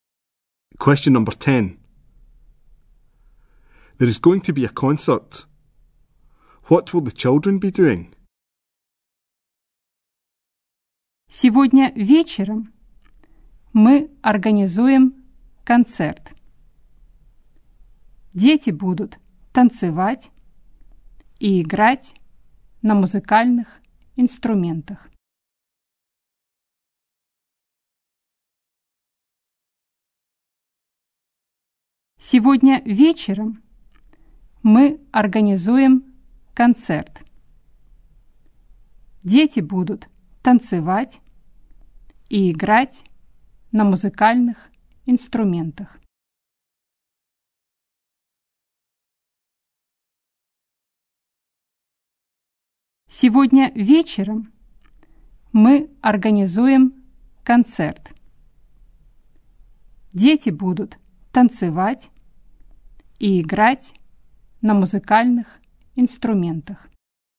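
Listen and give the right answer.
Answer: Dancing and playing musical instruments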